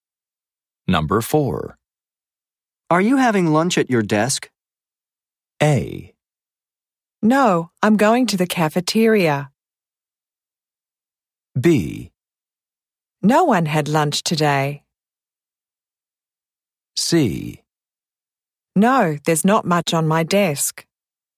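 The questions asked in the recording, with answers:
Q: Are you having lunch at your desk?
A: A: No, I'm going to the cafeteria.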